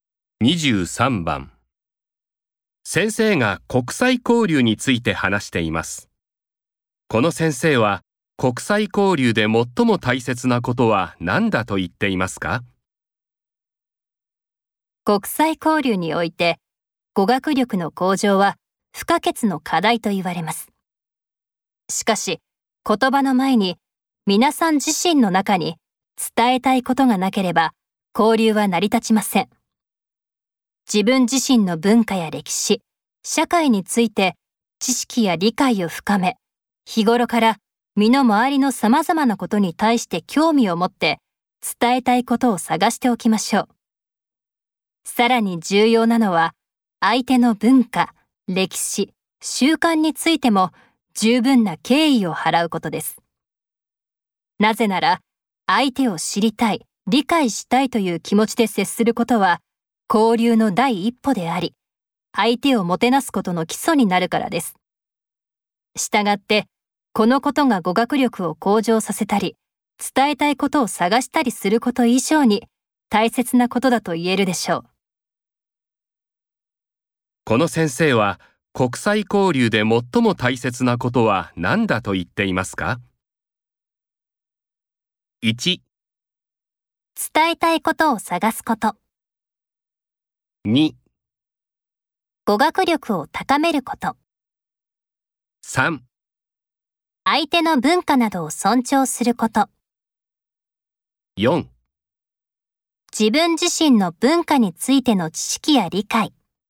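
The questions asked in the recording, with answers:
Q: この先生は、国際交流で最も大切なことは何だと言っていますか?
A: 3: 相手の文化などを尊重すること。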